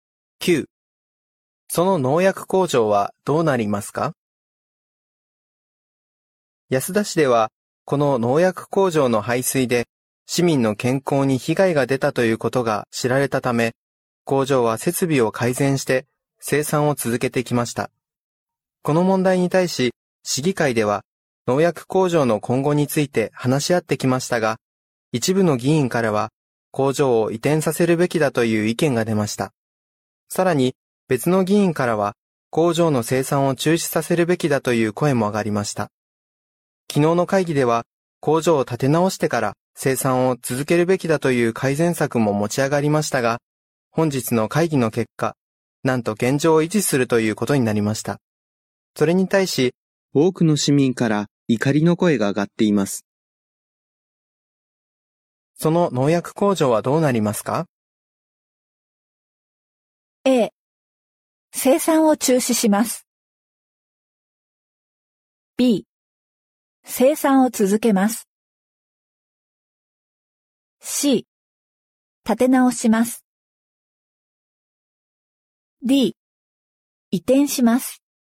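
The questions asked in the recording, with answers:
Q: その農薬工場はどうなりますか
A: B 生産を続けます。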